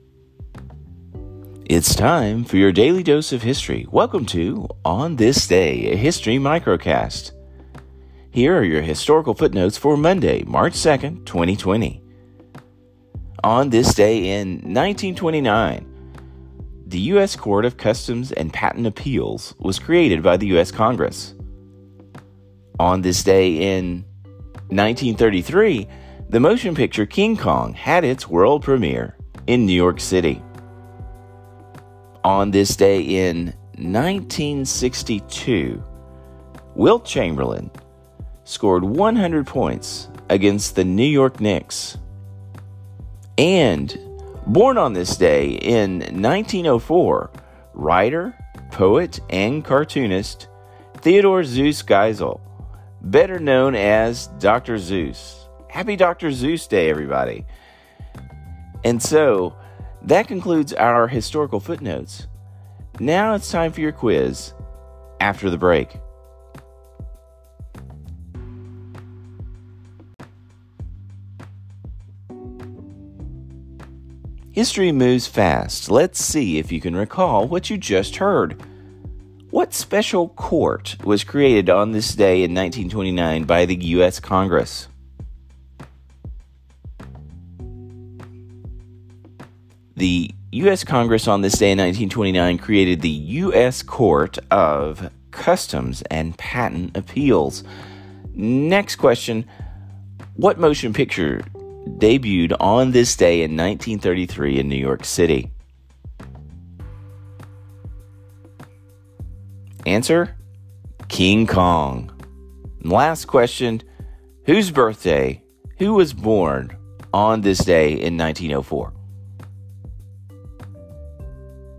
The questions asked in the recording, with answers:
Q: What special court was created on this day in 1929 by the U.S. Congress?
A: The U.S. Congress on this day in 1929 created the U.S. Court of Customs and Patent Appeals.

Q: Who was born on this day in 1904?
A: Answer, Dr. Zeus.